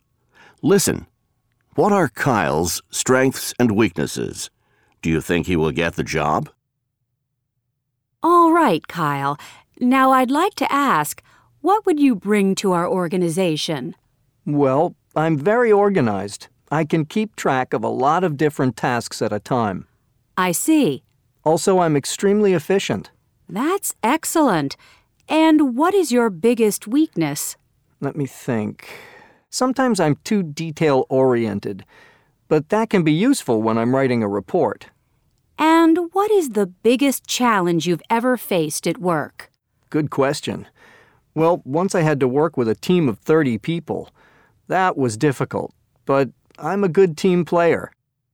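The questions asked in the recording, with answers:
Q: What are Kyle's strengths and weaknesses?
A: Strengths: very organized, extremely efficient, a good team player; weakness: sometimes too detail-oriented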